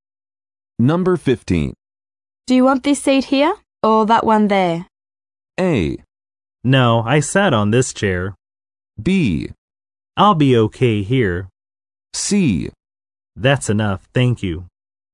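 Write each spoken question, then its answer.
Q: Do you want this seat here or that one there?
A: B: I'll be okay here.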